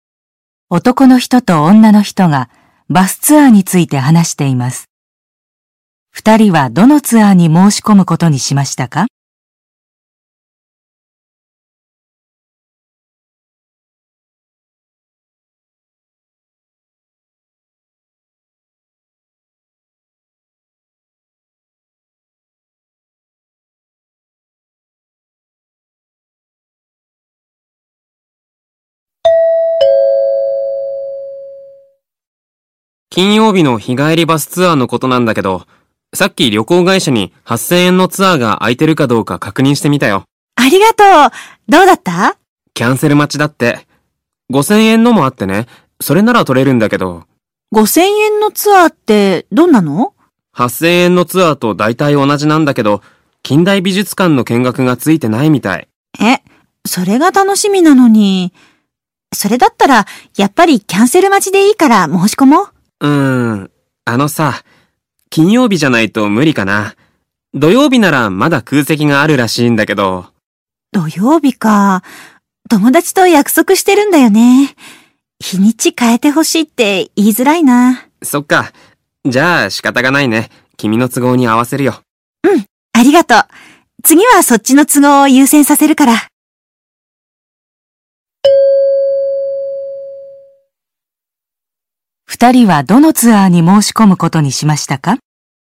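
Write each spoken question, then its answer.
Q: 二人はどのツアーに申し込むことにしましたか?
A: 金曜日の8000円のツアー(キャンセル待ち)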